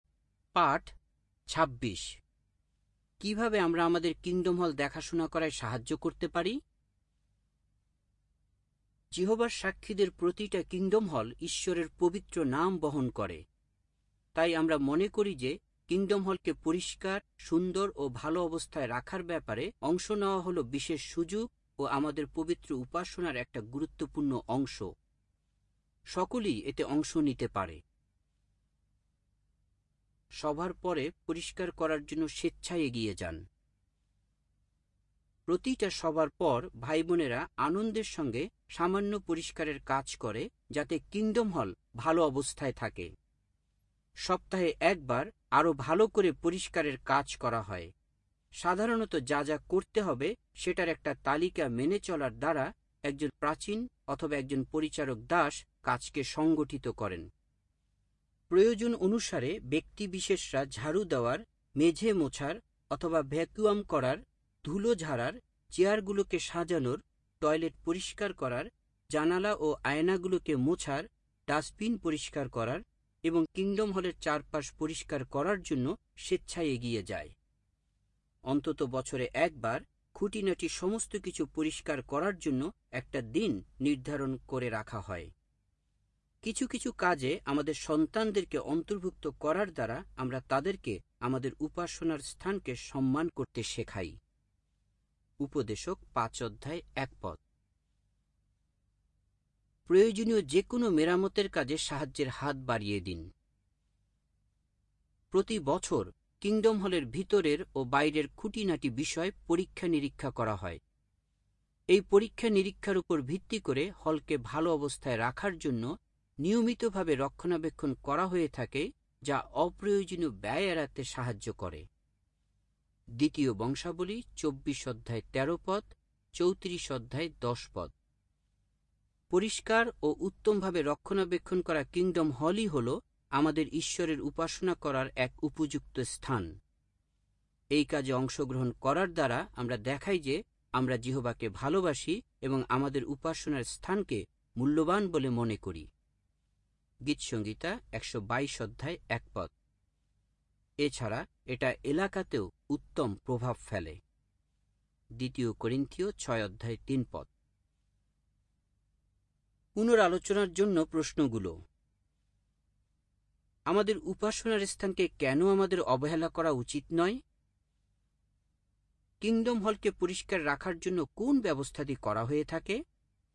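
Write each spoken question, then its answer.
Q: আমাদের উপাসনার স্থানকে কেন আমাদের অবহেলা করা উচিত নয়?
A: কারণ kingdom হল ঈশ্বরের পবিত্র নাম বহন করে এবং এটা যত্ন নেওয়া আমাদের পবিত্র উপাসনার গুরুত্বপূর্ণ অংশ

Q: kingdom হলকে পরিষ্কার রাখার জন্য কোন ব্যবস্থাটি করা হয়ে থাকে?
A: প্রতিটা সভার পর সামান্য পরিষ্কার, সপ্তাহে একবার আরও ভালো করে পরিষ্কার এবং বছরে অন্তত একবার খুঁটিনাটি সমস্ত কিছু পরিষ্কার করা হয়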